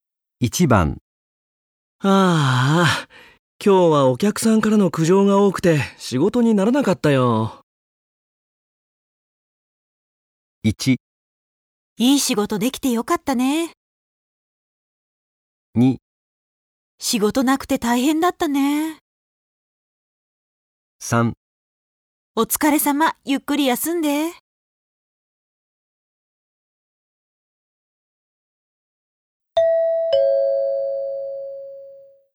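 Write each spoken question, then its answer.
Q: ああ、今日はお客さんからの苦情が多くて仕事にならなかったよ。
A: 3: お疲れ様、ゆっくり休んで。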